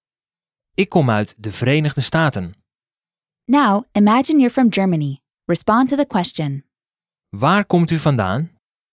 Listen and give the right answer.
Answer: Ik kom uit Duitsland.